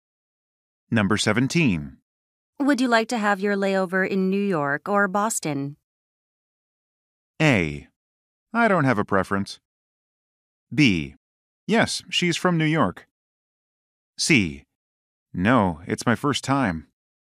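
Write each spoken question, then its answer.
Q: Would you like to have your layover in New York or Boston?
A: A: I don't have a preference.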